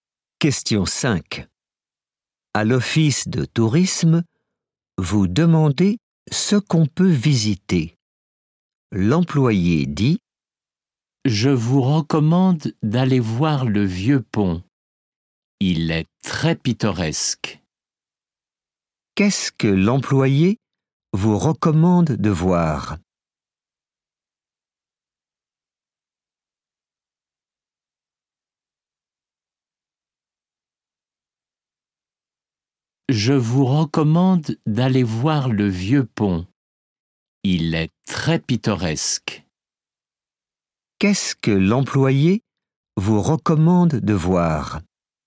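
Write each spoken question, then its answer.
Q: Qu'est-ce que l'employé vous recommande de voir?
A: le vieux pont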